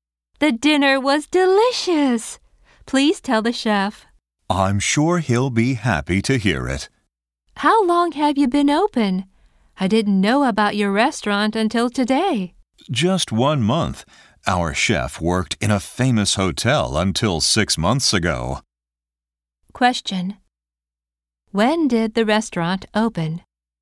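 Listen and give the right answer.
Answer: One month ago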